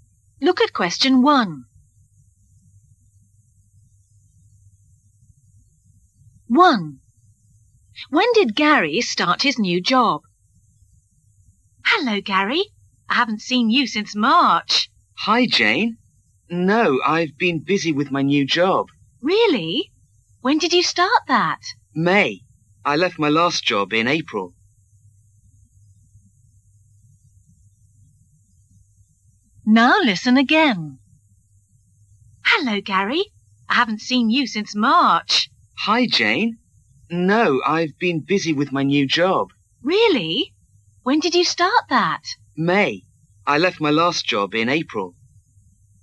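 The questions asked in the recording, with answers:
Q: When did Gary start his new job?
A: In May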